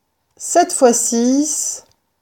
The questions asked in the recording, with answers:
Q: 7 fois 6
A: 7 fois 6 égale 42.